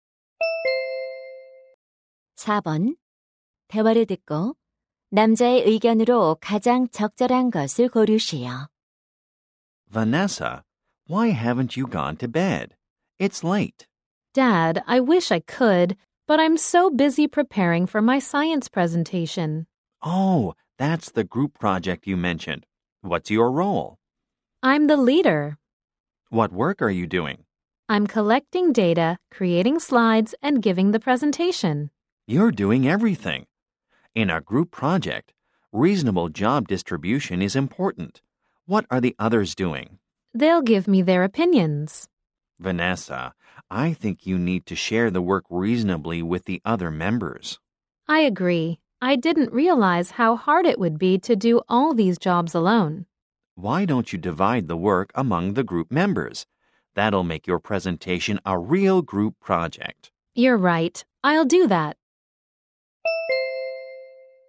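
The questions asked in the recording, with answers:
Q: 대화를 듣고 남자의 의견으로 가장 적절한 것을 고르시오.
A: 모둠 과제에서는 구성원 간 합리적인 역할 분담이 중요하다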